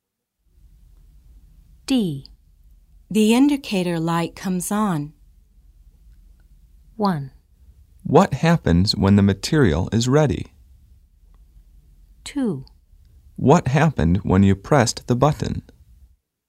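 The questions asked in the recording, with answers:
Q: The indicator light comes on.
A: 1: What happens when the material is ready?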